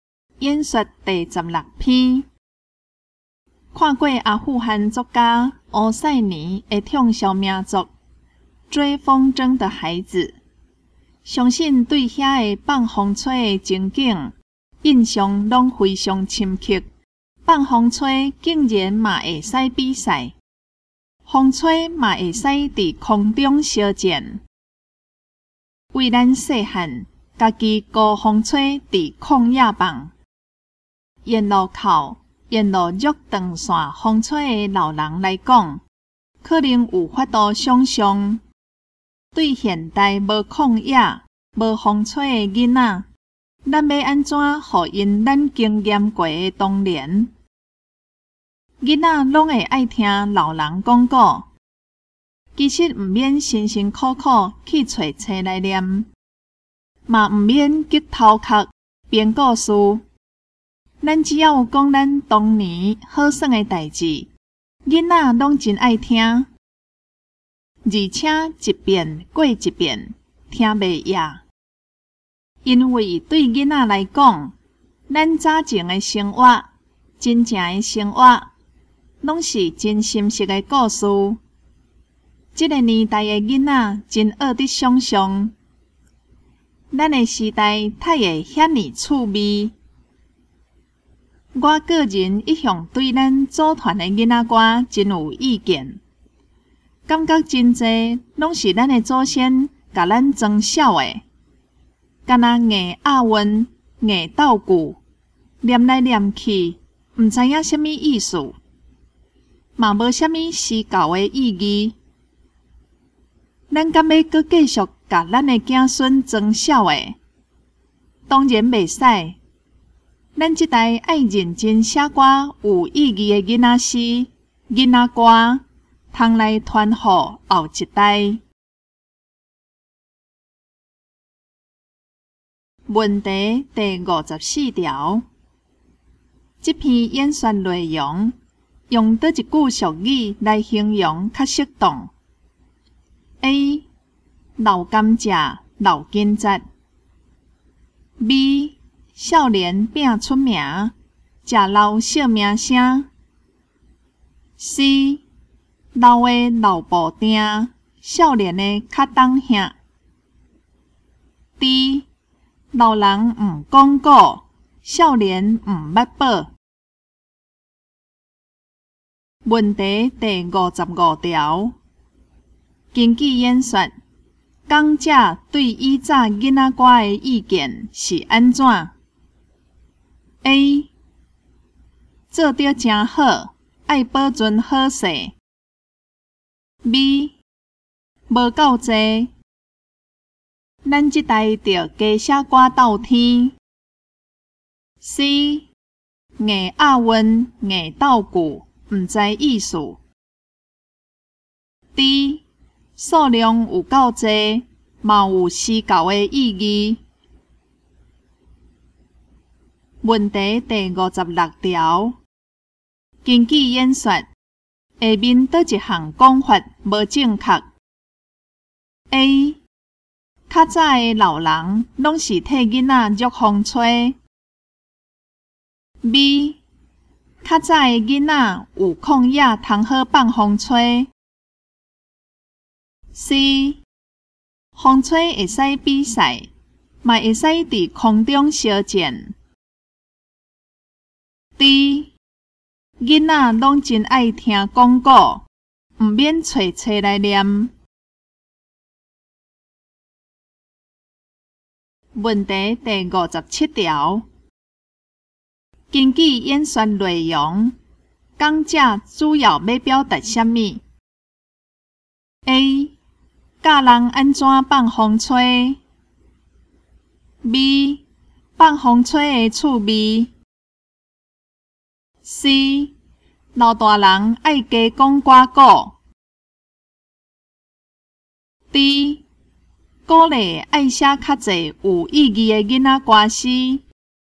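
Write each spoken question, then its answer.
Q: 这篇演说内容用哪一句俗语来形容较适当 ?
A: D: 老人唔讲过,少年唔捌报。

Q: 根据演说,讲者对以早囡仔歌的意见是安怎?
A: C: 硬押韵、硬斗鼓,毋知意思。

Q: 根据演说,下面哪一项讲法无正确 ?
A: A: 较早的老人拢是替囡仔捉风吹。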